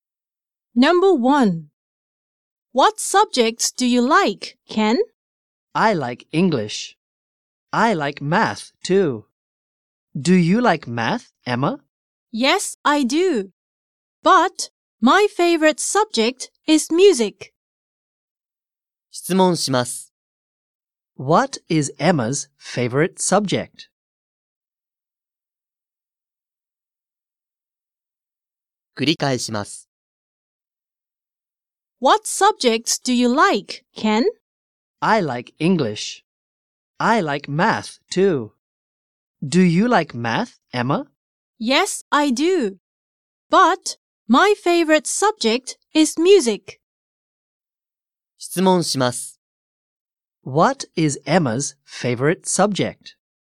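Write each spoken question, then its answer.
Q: What is Emma's favorite subject?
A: Music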